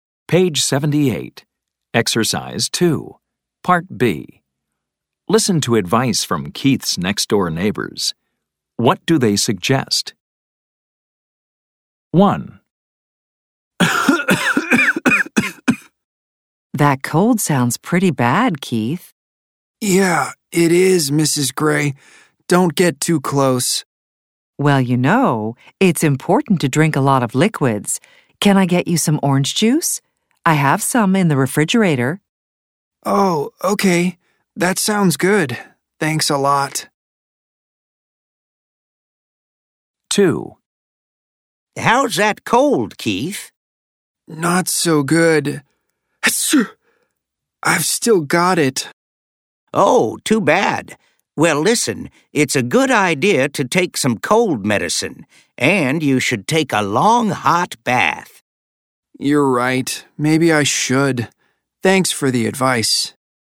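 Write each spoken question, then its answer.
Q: What do they suggest?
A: Drink a lot of liquids, like orange juice

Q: What do they suggest?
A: Take some cold medicine and a long hot bath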